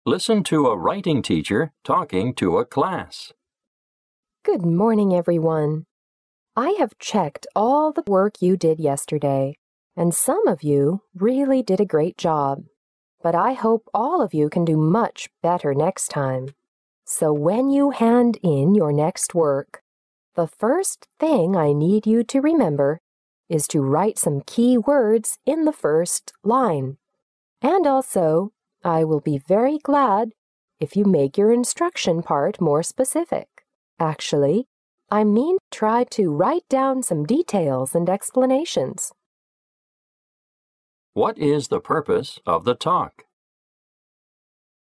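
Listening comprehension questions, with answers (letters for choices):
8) What is the purpose of the talk?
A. To postpone the paper that the students will hand in next time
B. To give requirements of the work to the students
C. To ask the students to write down the purpose of their work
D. To request the students to avoid including details in their work next time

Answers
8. B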